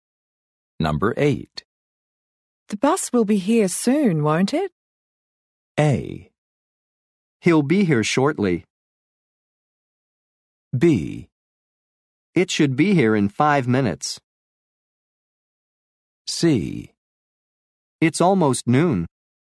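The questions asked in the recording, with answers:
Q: The bus will be here soon, won't it?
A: B: It should be here in 5 minutes.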